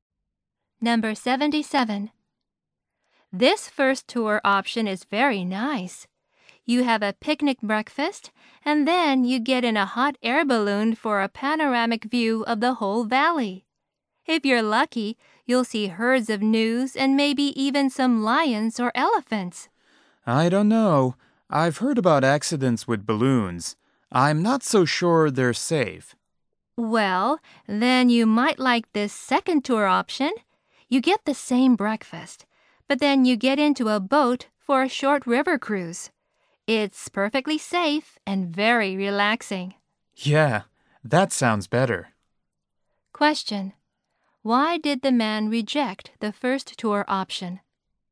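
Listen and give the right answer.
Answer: He thinks hot air balloons are not safe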